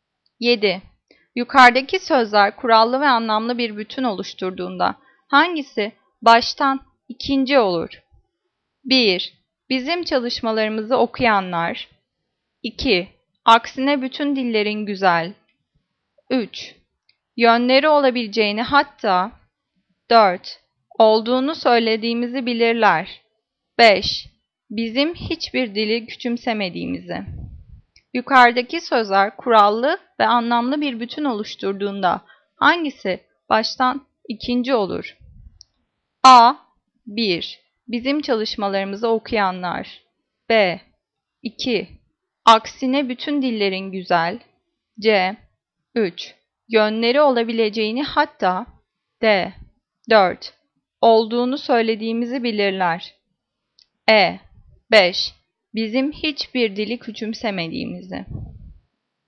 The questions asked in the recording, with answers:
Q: Yukarıdaki sözler kurallı ve anlamlı bir bütün oluşturduğunda hangisi baştan ikinci olur?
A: Cevap E. 5. Bizim hiçbir dili küçümsemediğimizi.